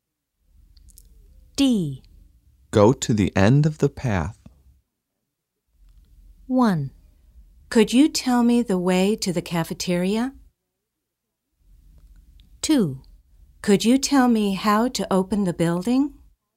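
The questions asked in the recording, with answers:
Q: Go to the end of the path.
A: 1: Could you tell me the way to the cafeteria?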